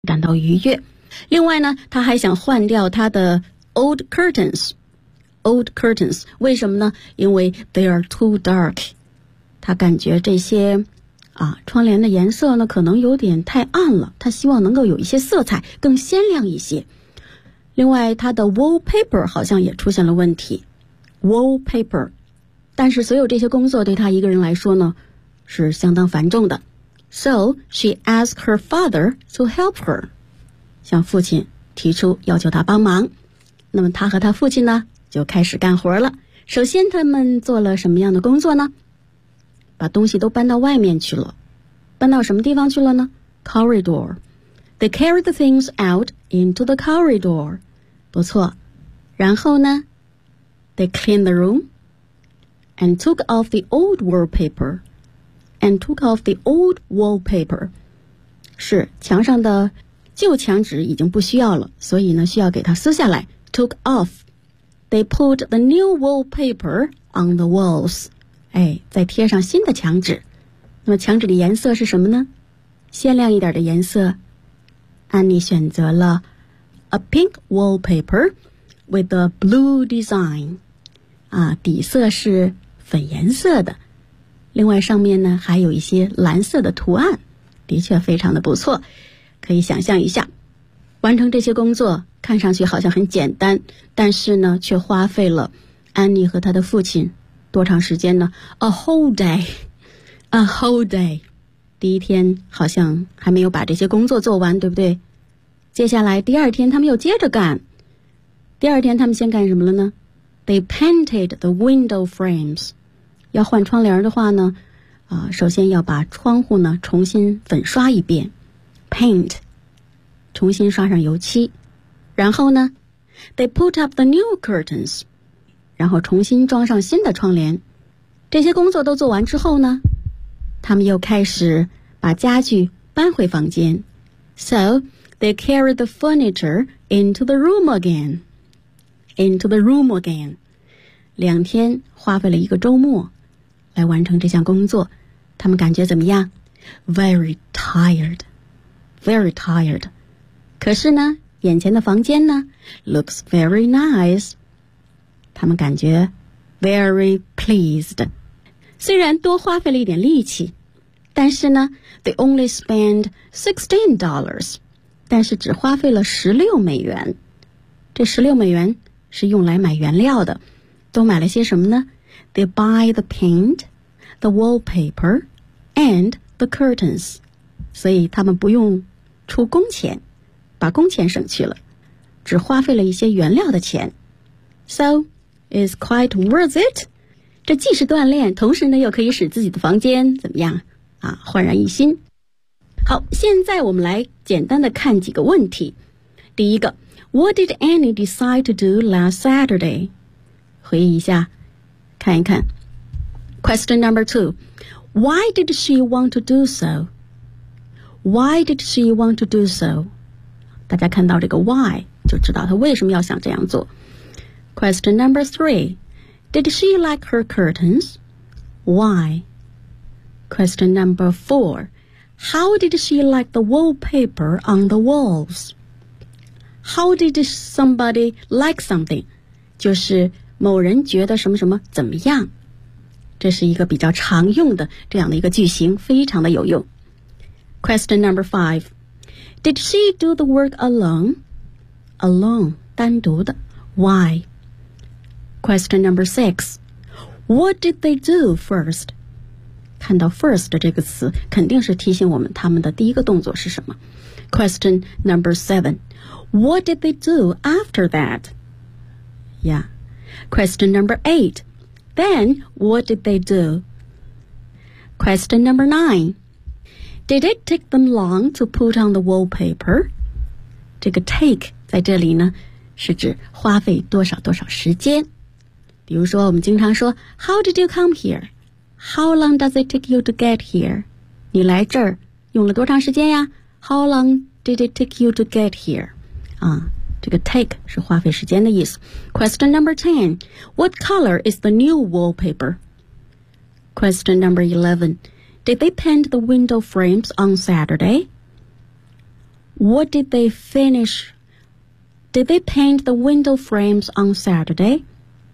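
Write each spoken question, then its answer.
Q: Did she like her curtains? Why?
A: No, because they were too dark.

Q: Did she do the work alone?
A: No, she asked her father to help her.

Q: What did they do first?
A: They carried the things out into the corridor.

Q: What did they do after that?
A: They cleaned the room and took off the old wallpaper.

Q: Then, what did they do?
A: They put the new wallpaper on the walls.

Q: What color is the new wallpaper?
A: Pink with a blue design.

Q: Did they paint the window frames on Saturday?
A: No, they painted them the next day (Sunday).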